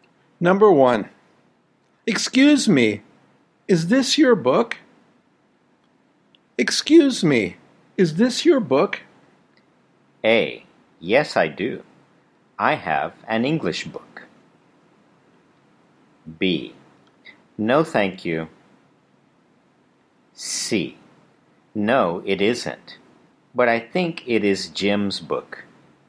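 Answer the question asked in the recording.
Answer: C: No, it isn't, but I think it is Jim's book.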